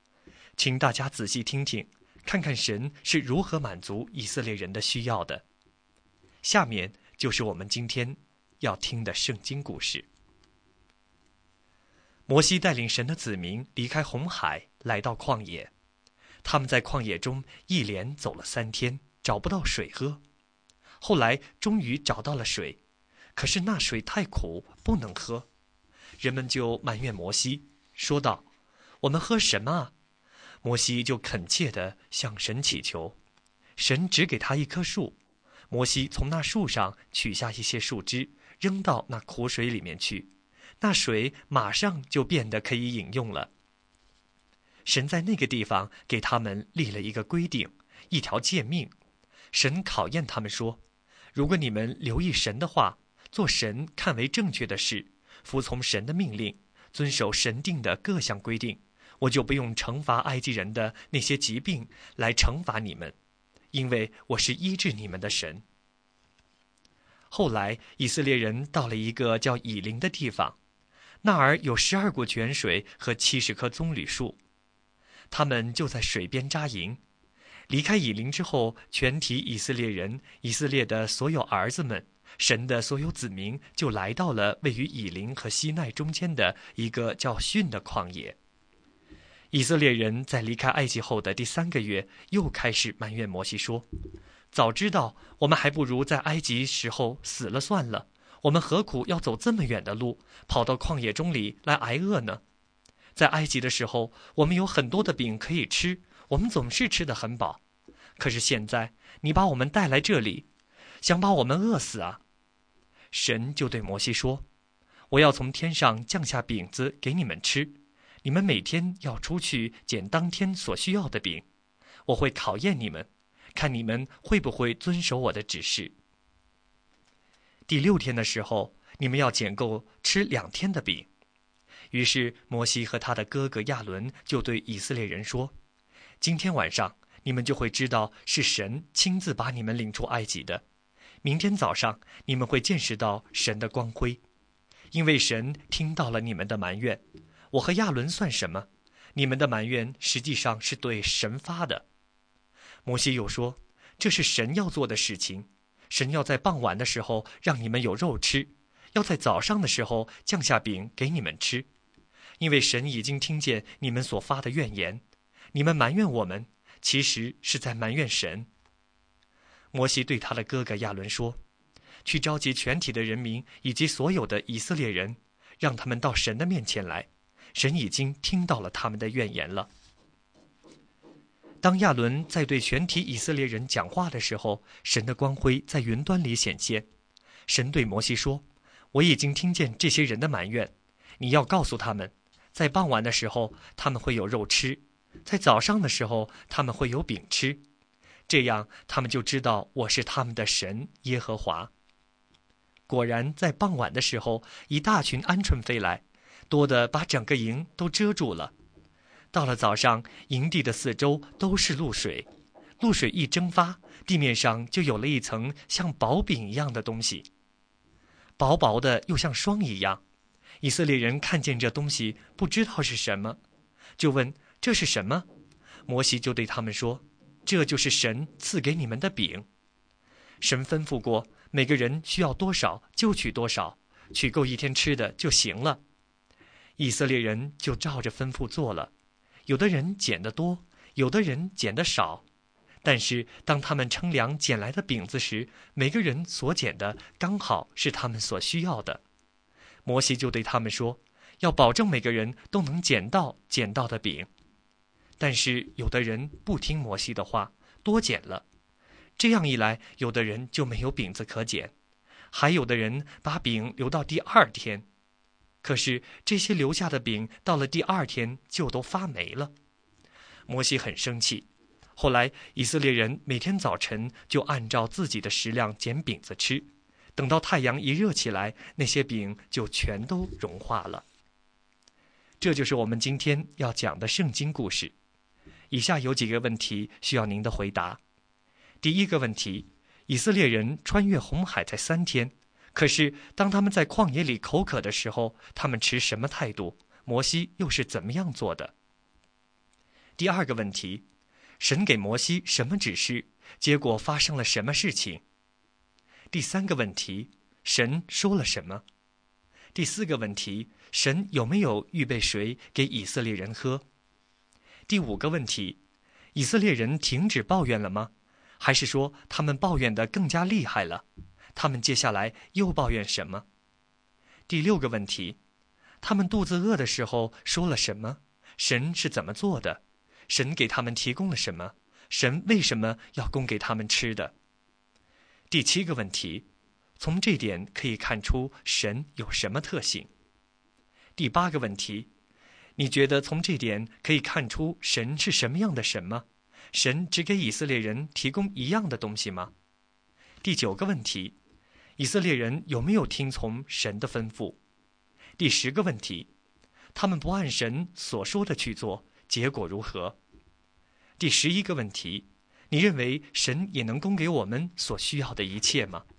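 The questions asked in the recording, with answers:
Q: 以色列人穿越红海才三天,可是当他们在旷野里口渴的时候,他们持什么态度? 摩西又是怎么样做的?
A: 他们埋怨摩西;摩西恳切地向神祈求

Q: 神给摩西什么指示?结果发生了什么事情?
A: 神指示他一棵树,他把树枝扔进苦水里,水就变得可以喝了

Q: 神有没有预备水给以色列人喝?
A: 有,在以琳有十二股泉水

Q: 以色列人停止抱怨了吗?还是说他们抱怨得更加厉害了? 他们接下来又抱怨什么?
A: 没有停止;他们又抱怨没有食物、会在旷野挨饿

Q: 他们肚子饿的时候说了什么? 神是怎么做的?神给他们提供了什么?神为什么要供给他们吃的?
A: 他们说还不如死在埃及;神傍晚给他们鹌鹑肉、早上给他们饼,让他们知道祂是他们的神耶和华

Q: 以色列人有没有听从神的吩咐?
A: 有的人没有听从,多捡了饼,还把饼留到第二天

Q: 他们不按神所说的去做,结果如何?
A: 留下的饼到第二天就发霉了,摩西很生气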